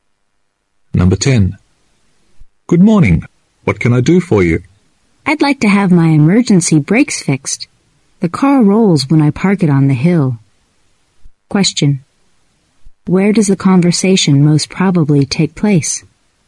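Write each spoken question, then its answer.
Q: Where does the conversation most probably take place?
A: At a car repair shop.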